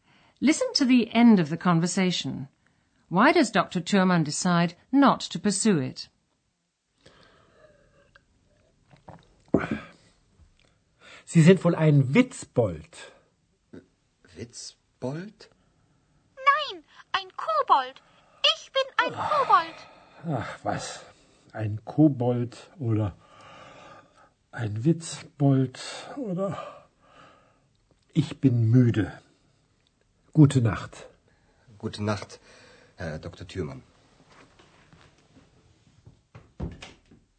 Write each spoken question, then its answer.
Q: Why does Dr. Thurmann decide not to pursue it?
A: Dr. Thürmann ends the conversation because he's tired.